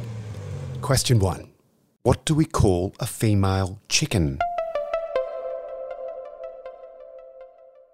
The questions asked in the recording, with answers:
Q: What do we call a female chicken?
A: A hen.